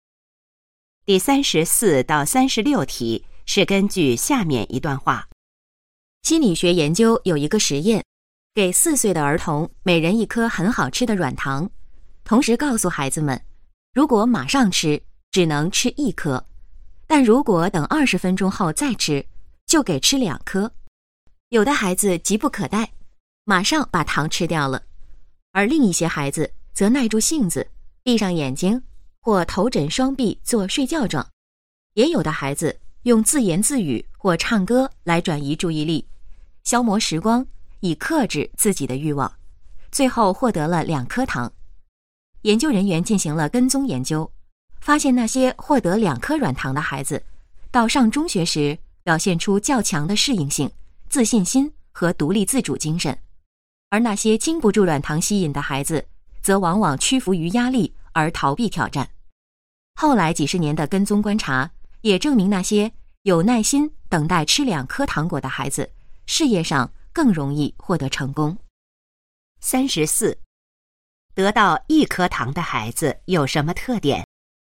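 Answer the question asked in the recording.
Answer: 急不可待,不能克制自己的欲望(经不住诱惑)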